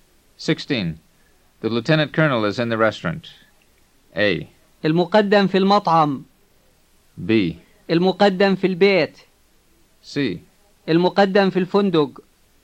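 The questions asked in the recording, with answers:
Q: The lieutenant colonel is in the restaurant.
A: A: المقدم في المطعم.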